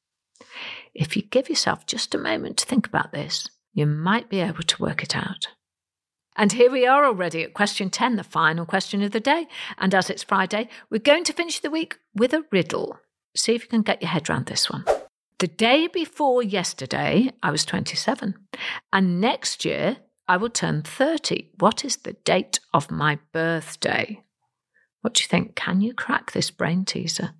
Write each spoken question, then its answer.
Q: What is the date of my birthday?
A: Well, my birthday would be December the 31st, and today would be January the 1st.